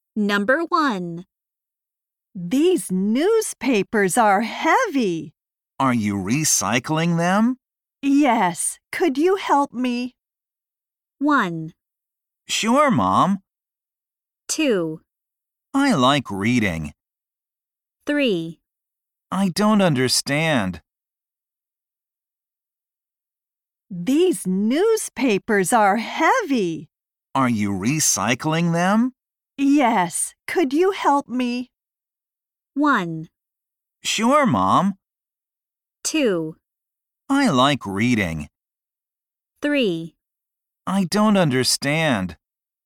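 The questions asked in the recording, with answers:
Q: Yes. Could you help me?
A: 1: Sure, Mom.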